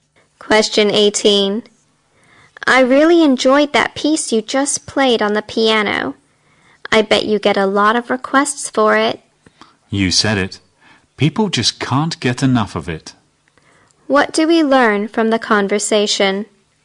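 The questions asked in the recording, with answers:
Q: What do we learn from the conversation?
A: The piano piece is very popular.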